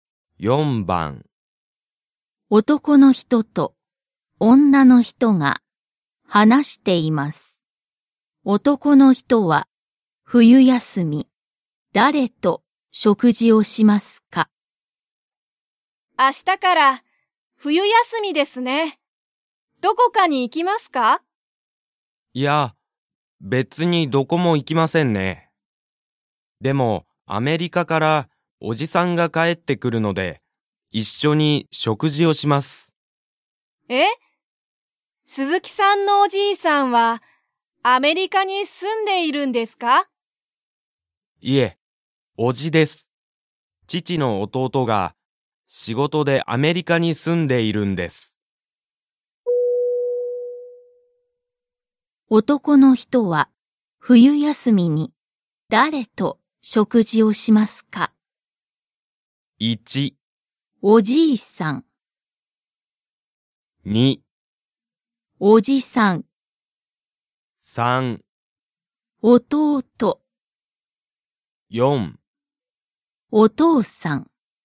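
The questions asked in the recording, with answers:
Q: 男の人は冬休みに誰と食事をしますか?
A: 2: おじさん。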